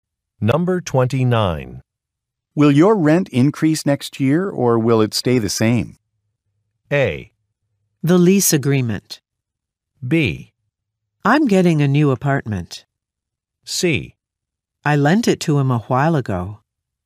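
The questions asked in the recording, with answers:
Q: Will your rent increase next year, or will it stay the same?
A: B: I'm getting a new apartment.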